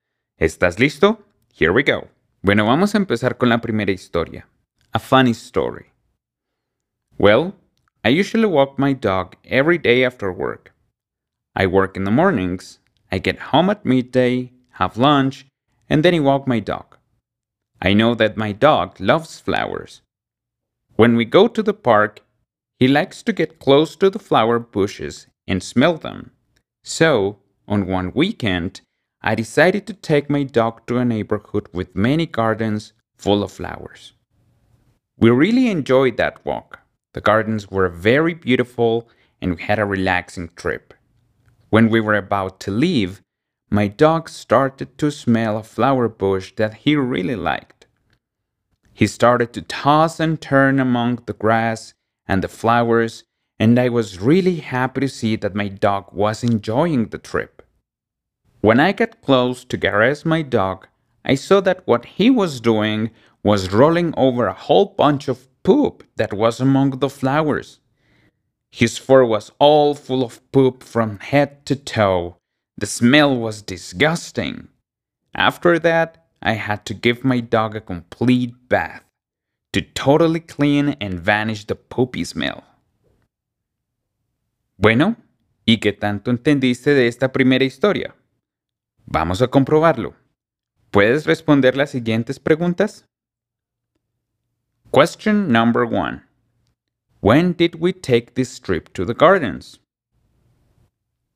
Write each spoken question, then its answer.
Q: When did we take this trip to the gardens?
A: The answer is, we took this trip on a weekend.